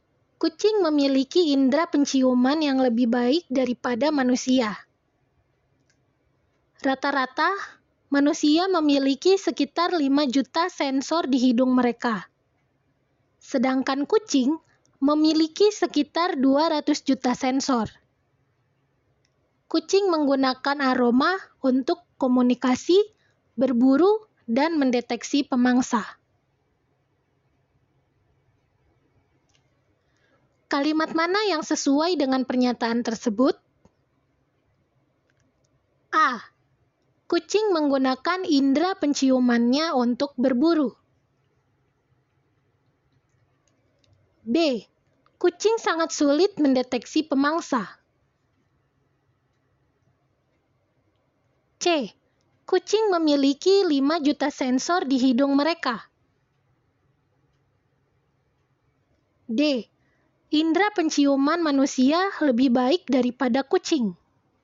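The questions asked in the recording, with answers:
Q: Kalimat mana yang sesuai dengan pernyataan tersebut?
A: A: Kucing menggunakan indera penciumannya untuk berburu.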